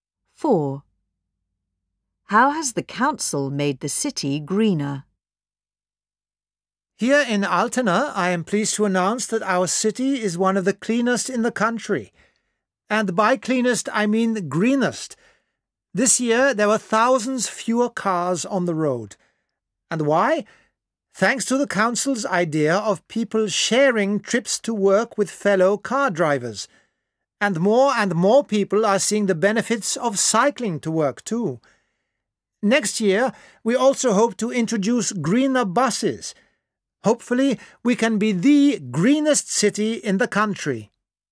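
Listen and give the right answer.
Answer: By getting people to share car trips to work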